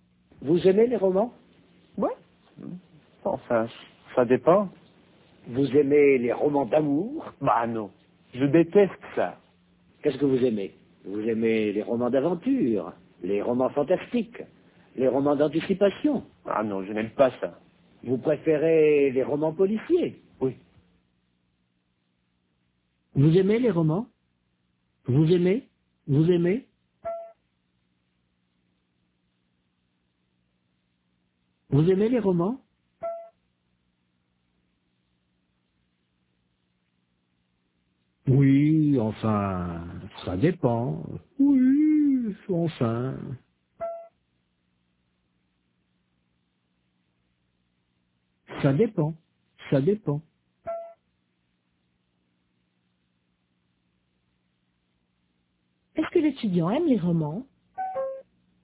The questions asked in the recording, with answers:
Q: Est-ce que l'étudiant aime les romans?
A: Oui, enfin, ça dépend.